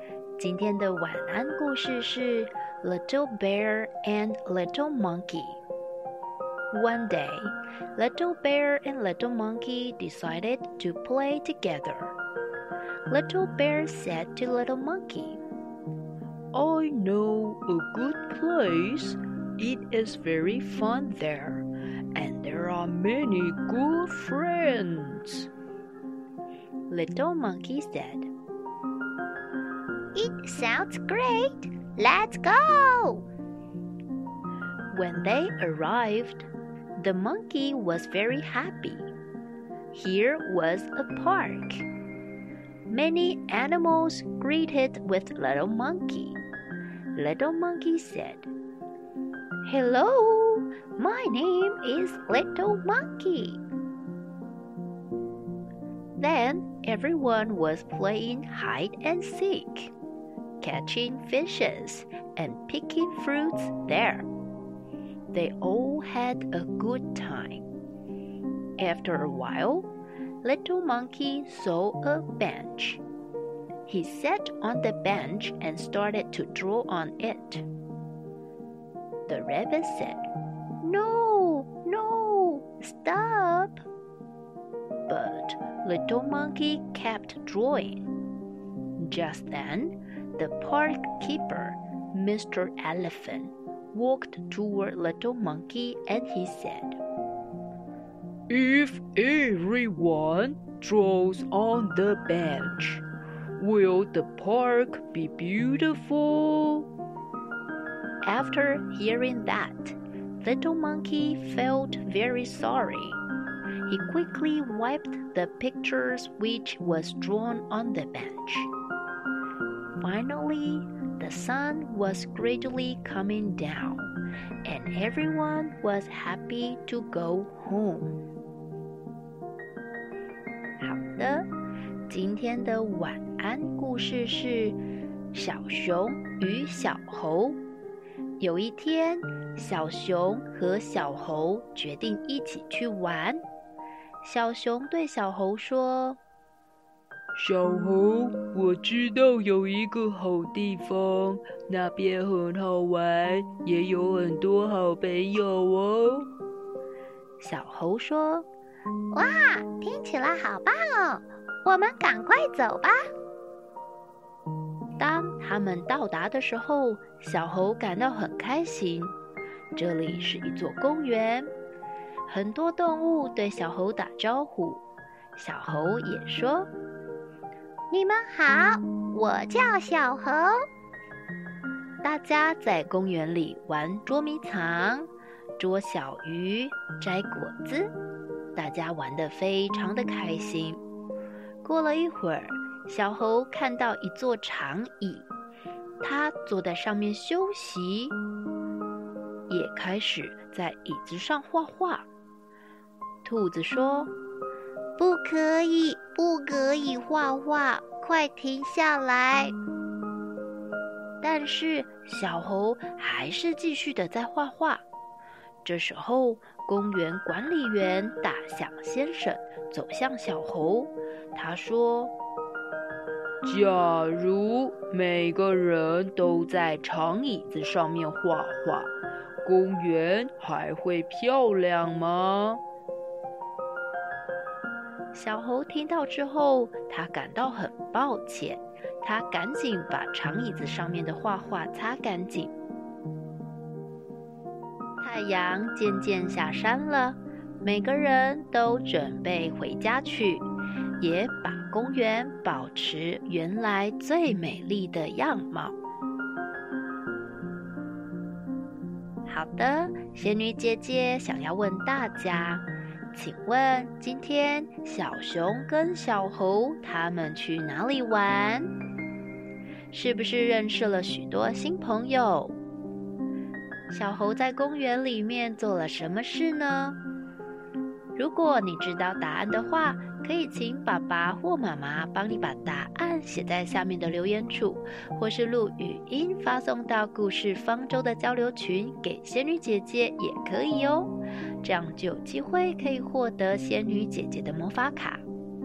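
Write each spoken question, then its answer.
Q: 请问今天小熊跟小猴他们去哪里玩?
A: 公园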